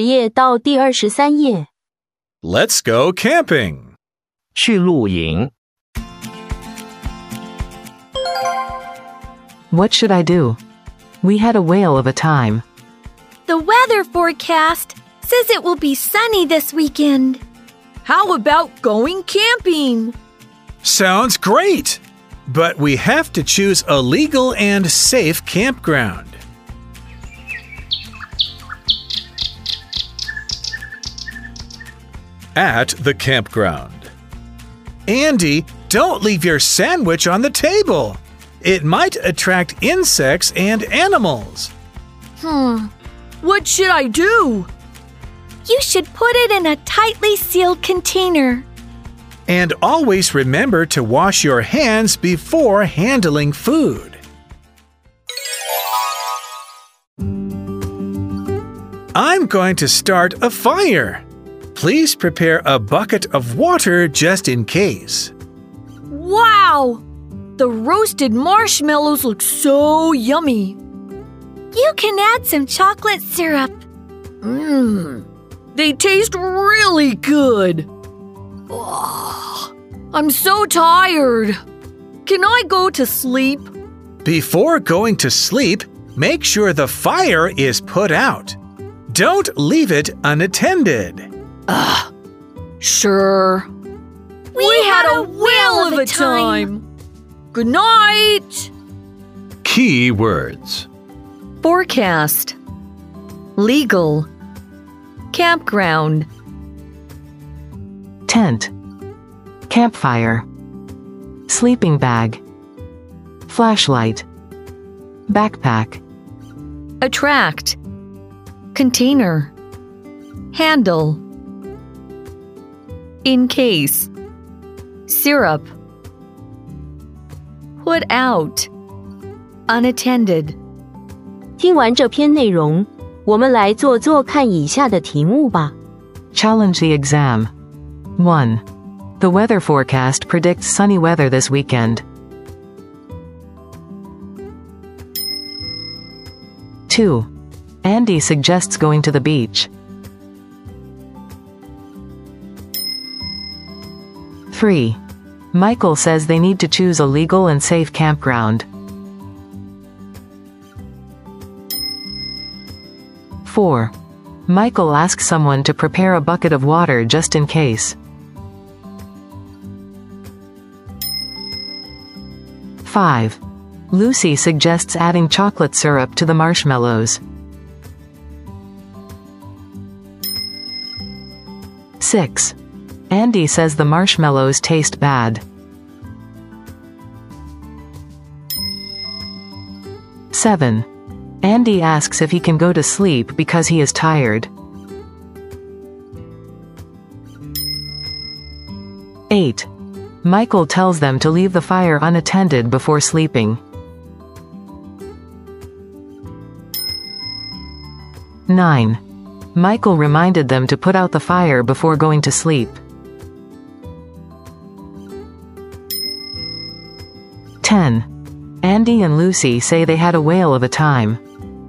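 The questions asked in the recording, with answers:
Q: The weather forecast predicts sunny weather this weekend.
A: True

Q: Andy suggests going to the beach.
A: False

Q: Andy says the marshmallows taste bad.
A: False

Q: Michael tells them to leave the fire unattended before sleeping.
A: False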